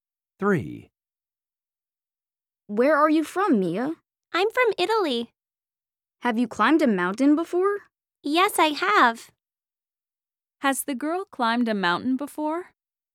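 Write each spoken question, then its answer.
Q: Has the girl climbed a mountain before?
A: Yes, she has.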